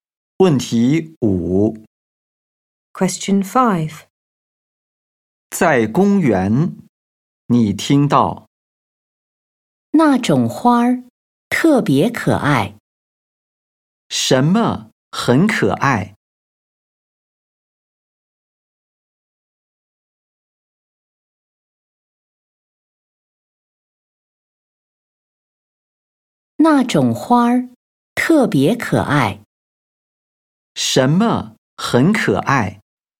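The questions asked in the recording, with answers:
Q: 什么很可爱?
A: 那种花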